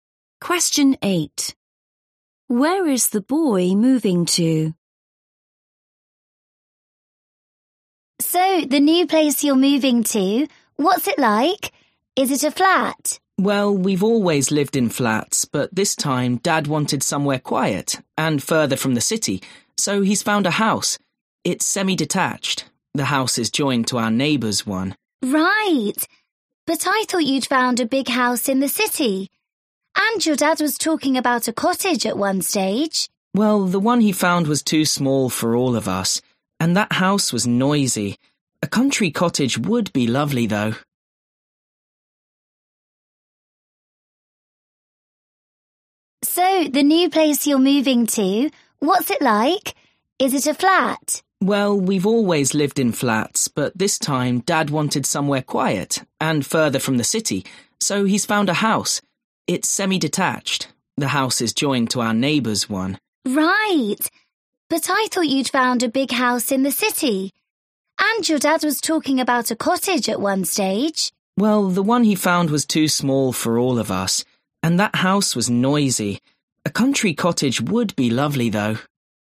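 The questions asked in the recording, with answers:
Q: Where is the boy moving to?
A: a semi-detached house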